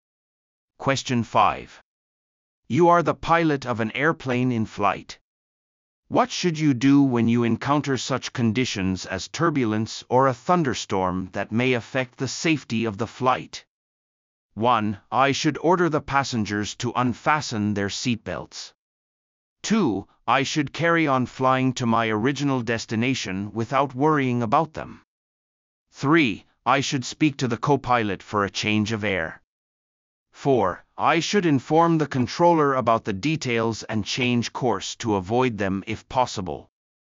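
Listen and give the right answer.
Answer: 4: I should inform the controller about the details and change course to avoid them if possible.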